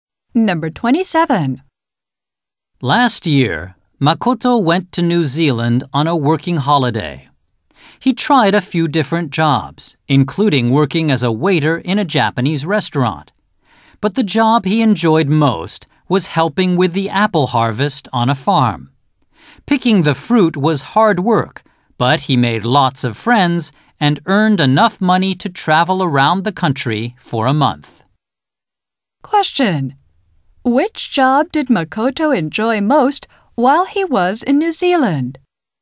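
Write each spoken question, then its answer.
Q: Which job did Makoto enjoy most while he was in New Zealand?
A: Helping with the apple harvest on a farm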